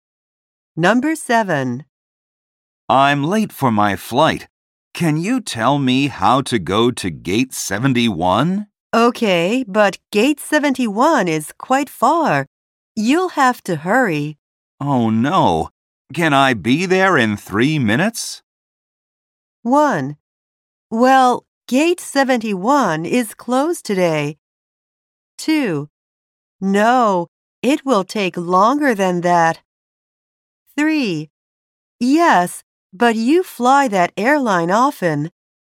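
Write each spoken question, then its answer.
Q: Oh no. Can I be there in 3 minutes?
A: 2: No, it will take longer than that.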